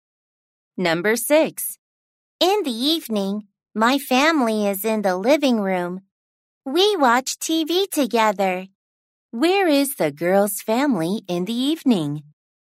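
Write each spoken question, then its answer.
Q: Where is the girl's family in the evening?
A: In the living room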